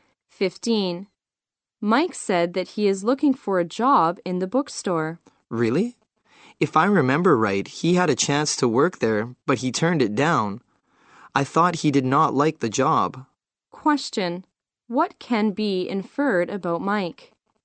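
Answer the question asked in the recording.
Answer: He turned down a chance to work at the bookstore before.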